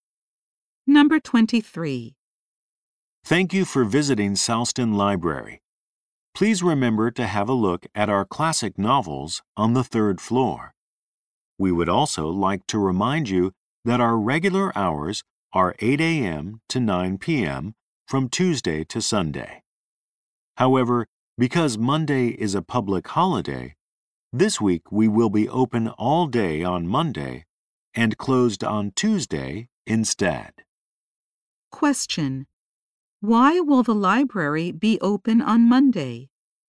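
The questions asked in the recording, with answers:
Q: why will the library be open on Monday?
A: Because Monday is a public holiday this week.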